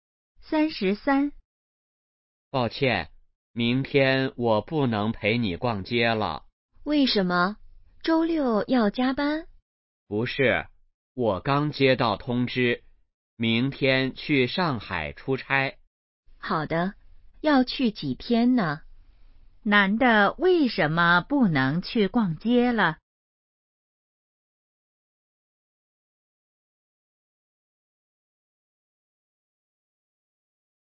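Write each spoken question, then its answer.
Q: 男的为什么不能去逛街了?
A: 要去上海出差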